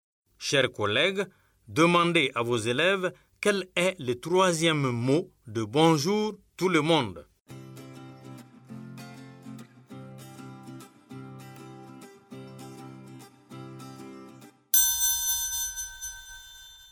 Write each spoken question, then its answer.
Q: Chers collègues, demandez à vos élèves quel est le troisième mot de bonjour tout le monde.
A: J'espère que vos élèves ont dit le.